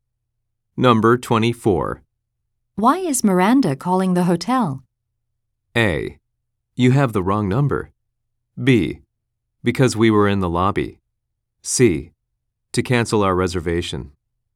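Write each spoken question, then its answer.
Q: Why is Miranda calling the hotel?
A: C: To cancel our reservation.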